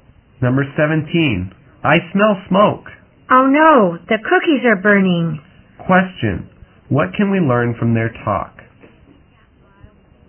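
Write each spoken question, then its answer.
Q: Question, what can we learn from their talk?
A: The cookies are burning.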